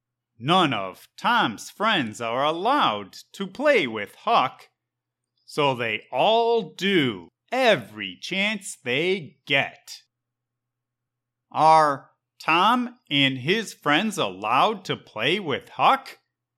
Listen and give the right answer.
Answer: Nope. But they do every chance they get.